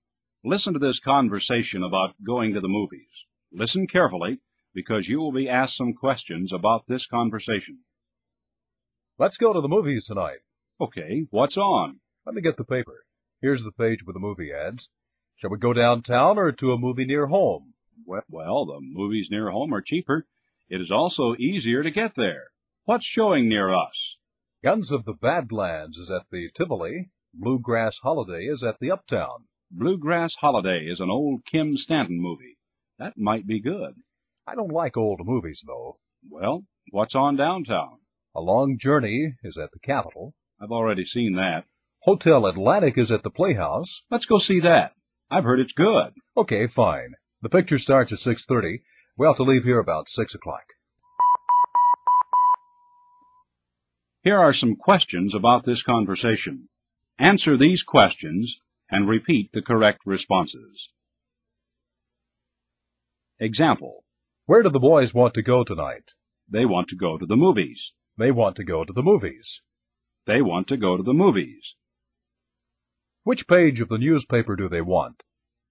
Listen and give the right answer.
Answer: They want the page with the movie ads.